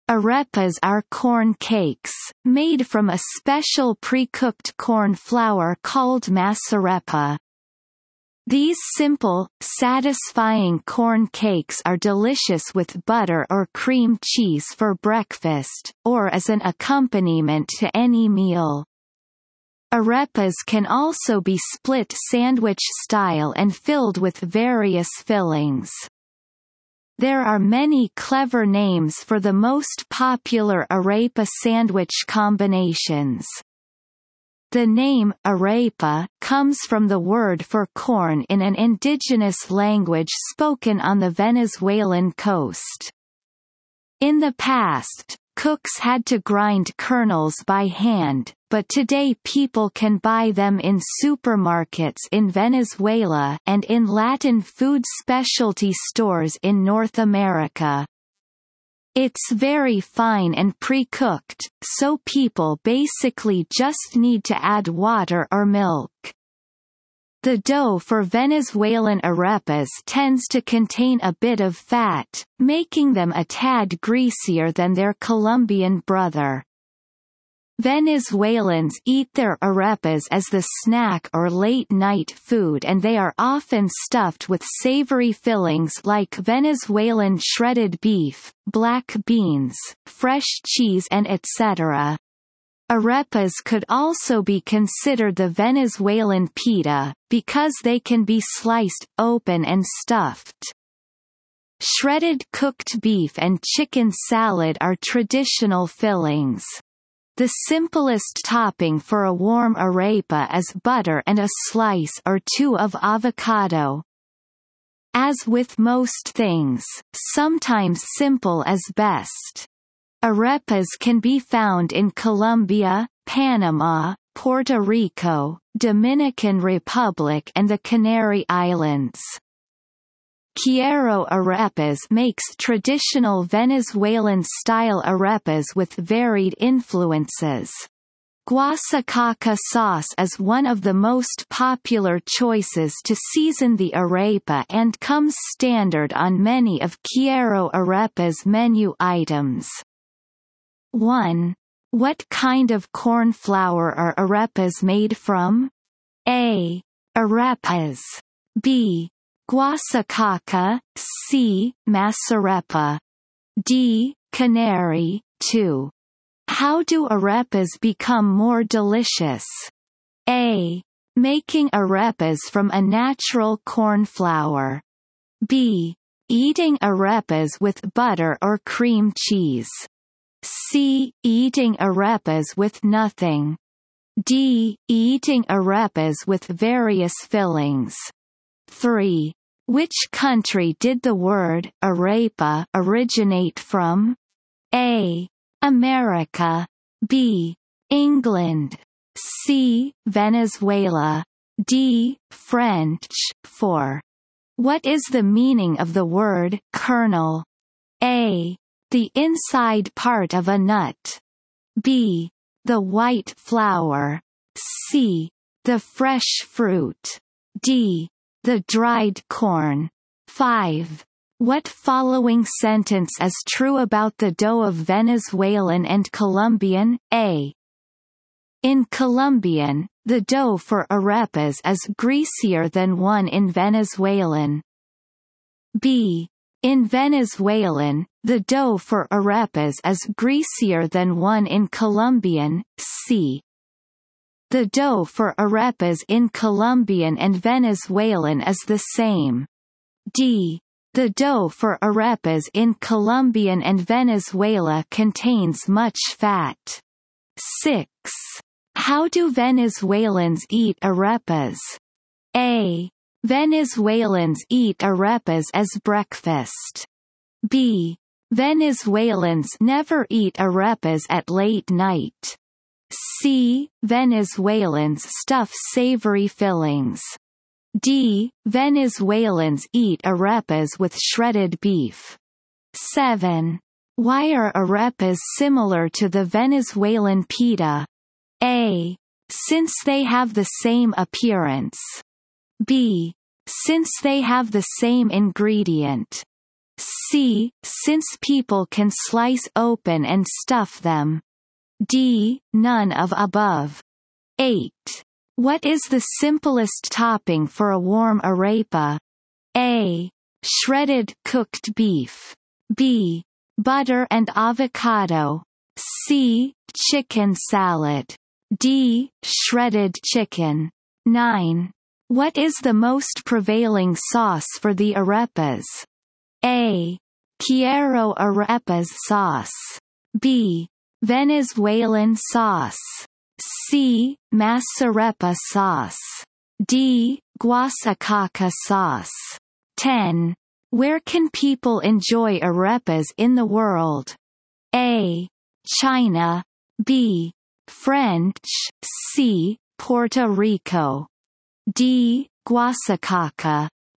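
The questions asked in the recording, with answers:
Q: What kind of corn flour are arepas made from?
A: C: Masarepa

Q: Which country did the word arepa originate from?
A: C: Venezuela

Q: What following sentence is true about the dough of Venezuelan and Colombian?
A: B: In Venezuelan, the dough for arepas is greasier than one in Colombian.

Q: Why are arepas similar to the Venezuelan pita?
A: C: Since people can slice open and stuff them.

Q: What is the simplest topping for a warm arepa?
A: B: Butter and avocado.

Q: What is the most prevailing sauce for the arepas?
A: D: Guasacaca sauce.

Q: Where can people enjoy arepas in the world?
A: C: Puerto Rico.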